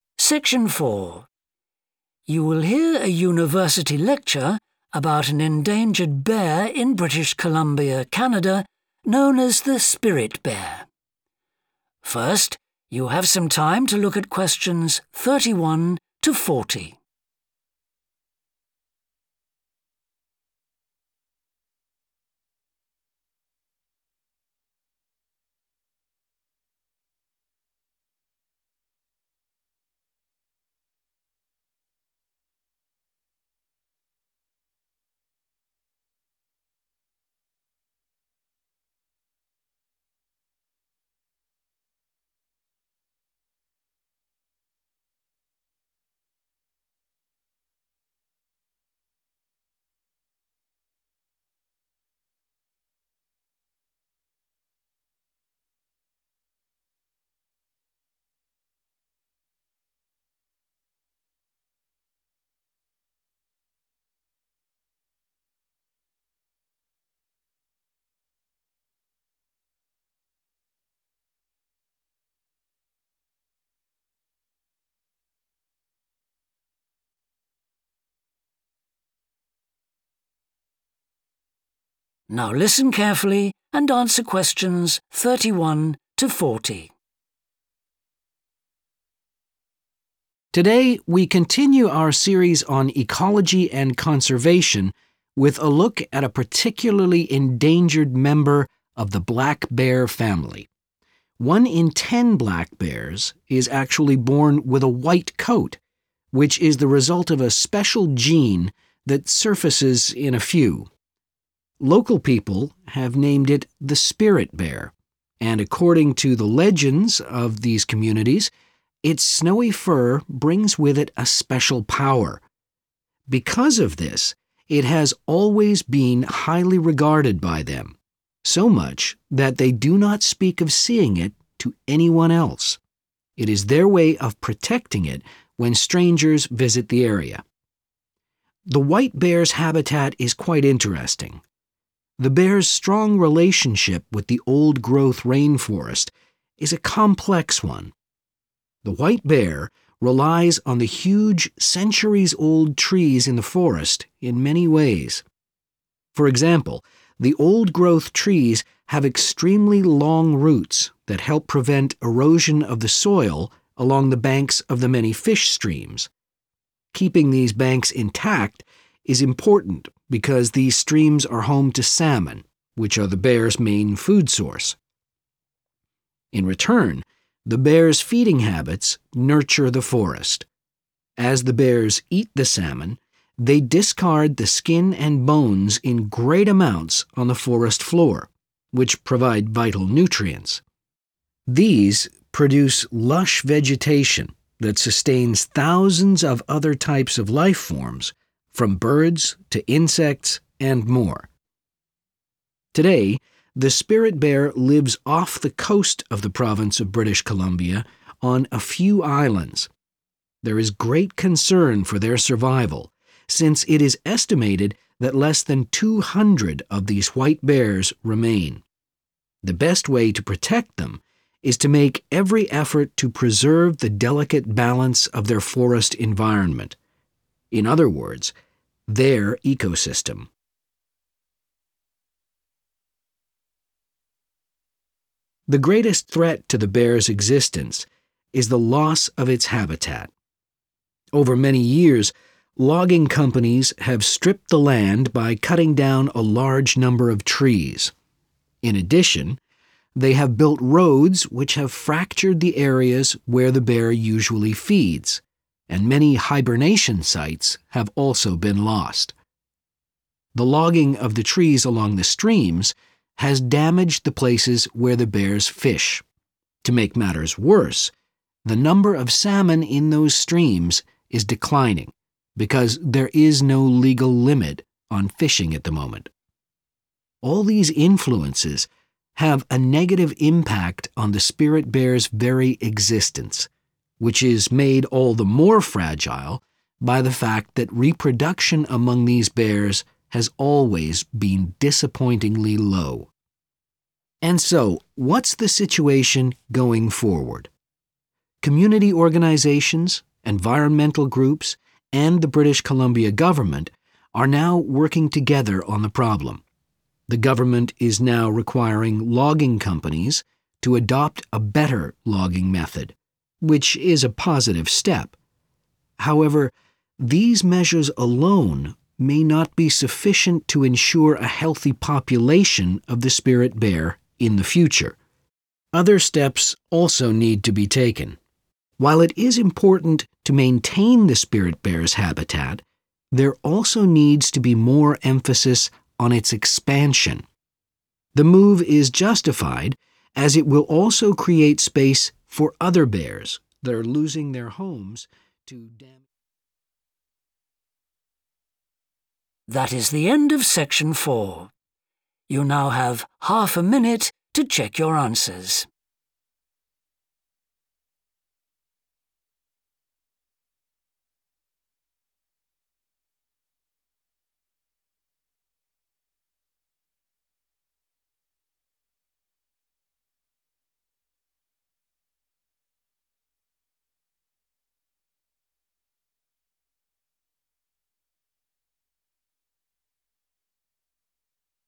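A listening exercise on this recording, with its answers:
Complete the notes below. Write ONE WORD ONLY.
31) Its colour comes from an uncommon (31)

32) Local people believe that it has unusual (32)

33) They protect the bear from (33)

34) Tree roots stop (34) along salmon streams.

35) It is currently found on a small number of (35)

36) Habitat is being lost due to deforestation and construction of (36) by logging companies.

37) Unrestricted (37) is affecting the salmon supply.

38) The bears' existence is also threatened by their low rate of (38)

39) Logging companies must improve their (39) of logging.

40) Maintenance and (40) of the spirit bears' territory is needed.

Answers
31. gene
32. power
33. strangers
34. erosion
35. islands
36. roads
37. fishing
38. reproduction
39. method
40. expansion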